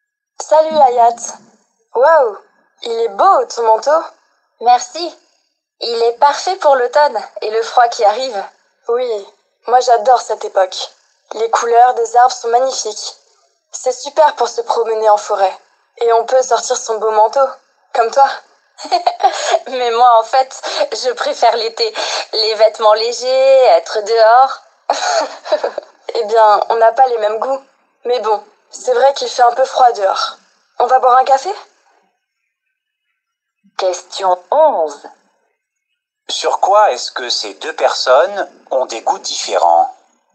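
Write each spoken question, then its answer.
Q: Sur quoi est-ce que ces deux personnes ont des goûts différents?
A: Sur la saison préférée (l'automne ou l'été)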